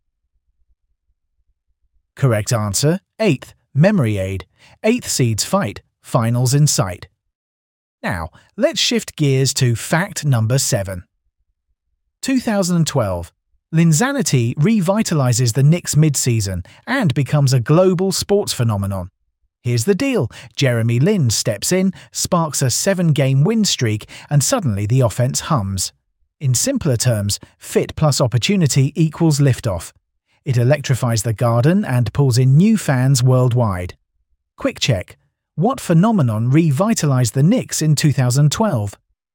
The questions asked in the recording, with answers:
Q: What phenomenon revitalized the Knicks in 2012?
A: Correct answer, Linsanity